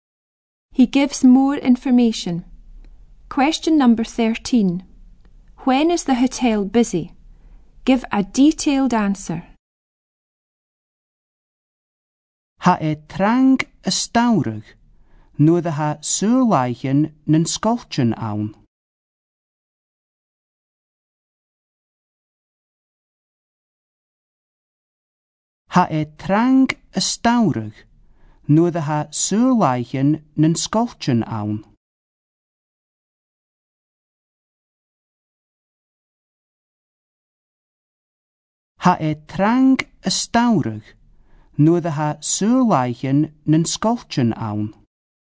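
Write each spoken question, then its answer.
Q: When is the hotel busy?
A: In summer, when the schools are on holiday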